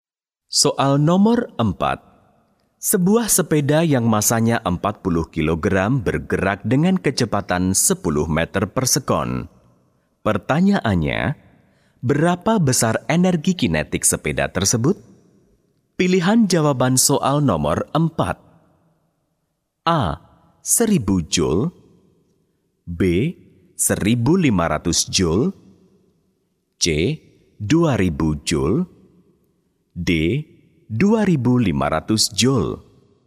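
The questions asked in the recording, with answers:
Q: Pertanyaannya, berapa besar energi kinetik sepeda tersebut?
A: C: 2000 joule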